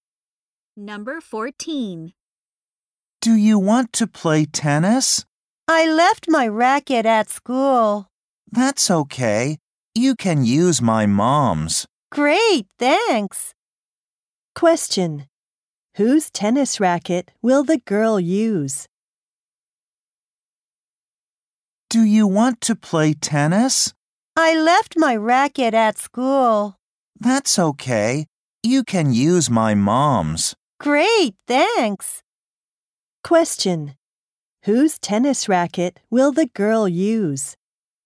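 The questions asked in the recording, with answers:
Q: Whose tennis racket will the girl use?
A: The boy's mother's.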